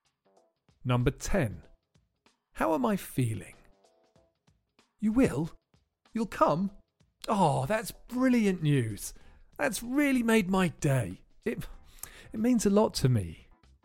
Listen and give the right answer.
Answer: I'm feeling really happy.